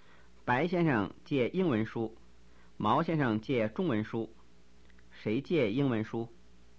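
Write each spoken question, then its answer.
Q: 谁借英文书?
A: 白先生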